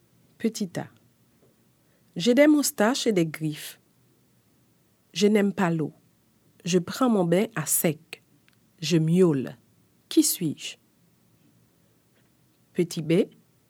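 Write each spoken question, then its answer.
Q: Qui suis-je?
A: le chat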